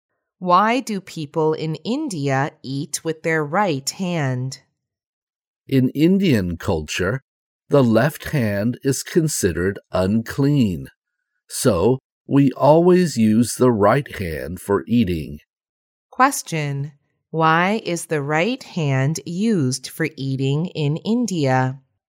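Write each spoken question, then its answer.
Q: Why is the right hand used for eating in India?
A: Because the left hand is considered unclean in Indian culture.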